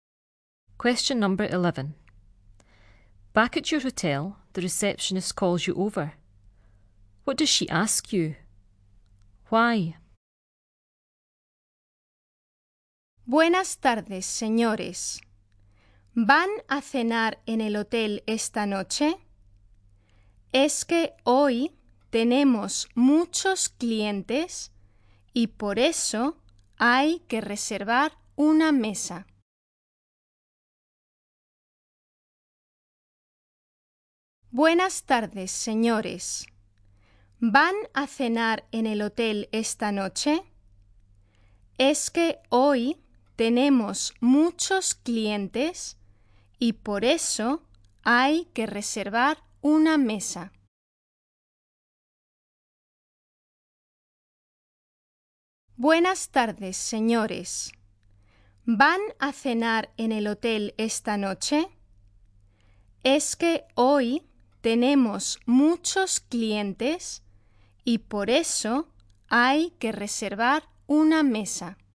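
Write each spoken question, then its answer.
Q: What does she ask you?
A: Whether you are having dinner in the hotel tonight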